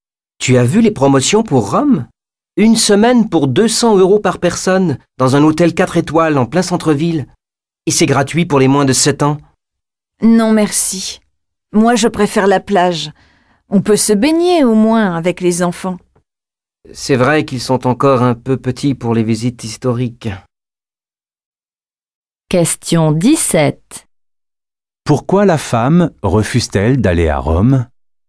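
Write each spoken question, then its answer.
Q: Pourquoi la femme refuse-t-elle d'aller à Rome?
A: Elle préfère la plage, où on peut se baigner avec les enfants.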